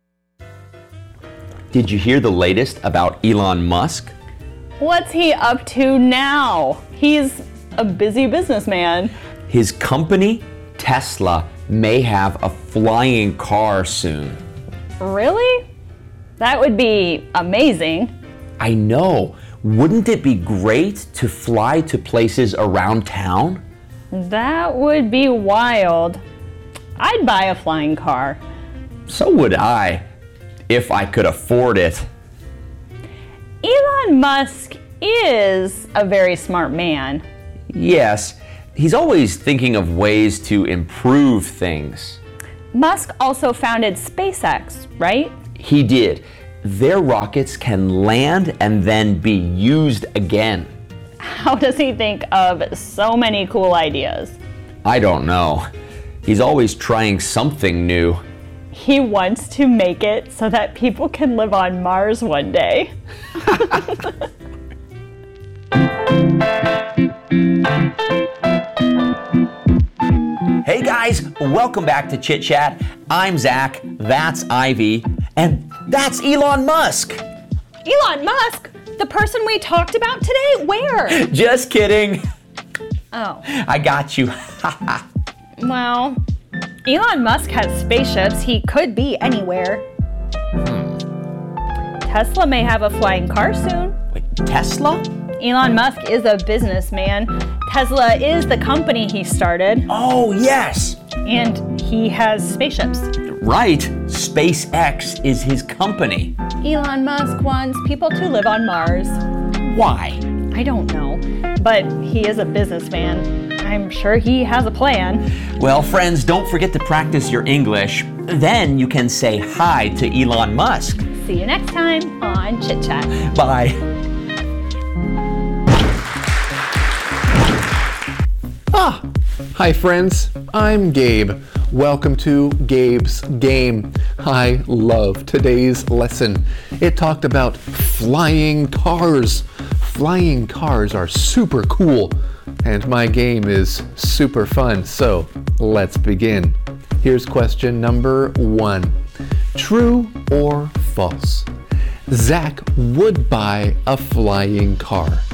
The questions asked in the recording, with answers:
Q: True or false? Zach would buy a flying car.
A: If you answered true, you're correct.